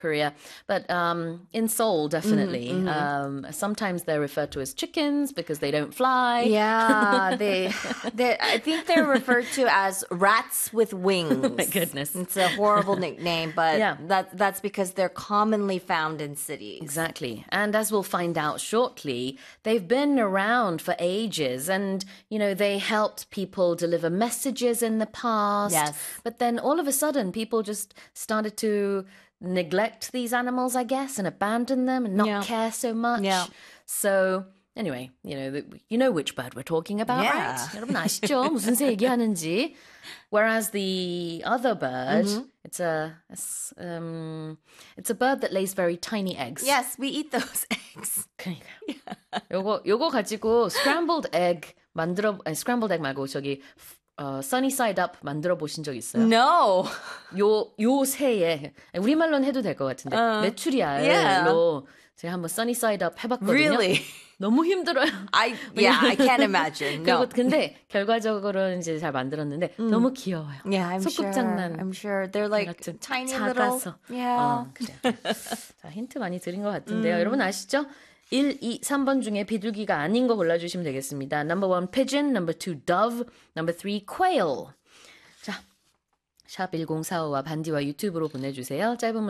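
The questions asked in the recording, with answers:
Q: 1, 2, 3번 중에 비둘기가 아닌 거 골라주시면 되겠습니다.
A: 3: quail (메추라기)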